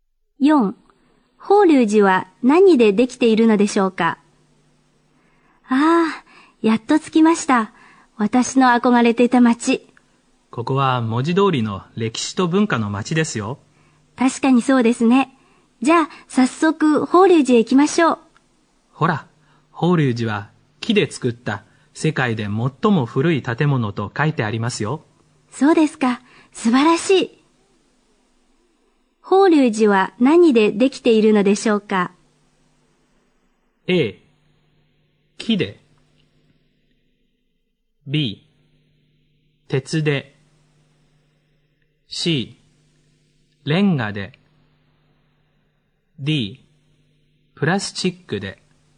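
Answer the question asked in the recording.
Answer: A: 木で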